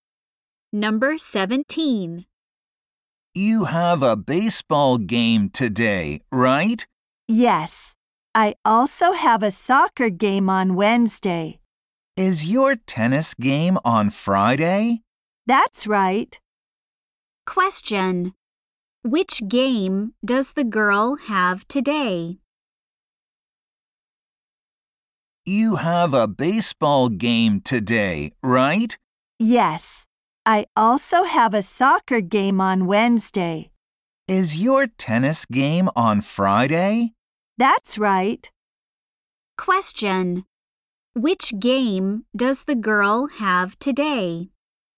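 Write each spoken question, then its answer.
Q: Which game does the girl have today?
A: A baseball game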